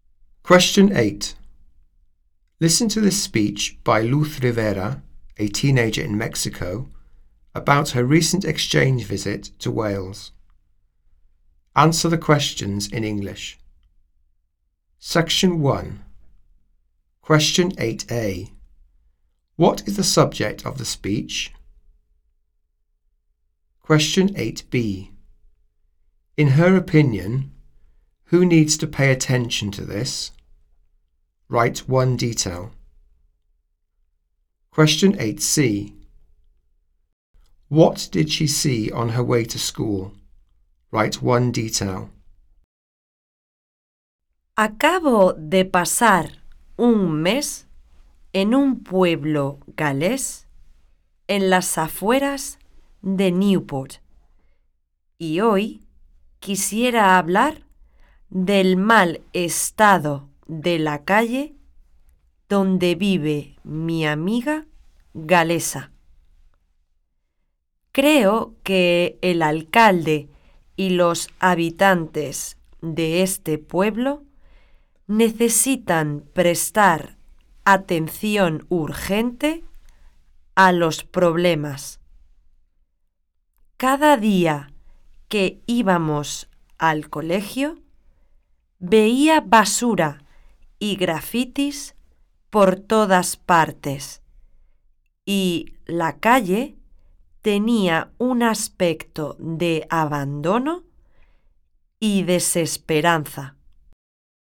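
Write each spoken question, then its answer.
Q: What is the subject of the speech?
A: The bad state of the street where her Welsh friend lives

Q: In her opinion, who needs to pay attention to this?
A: The mayor and the inhabitants

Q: What did she see on her way to school?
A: Rubbish and graffiti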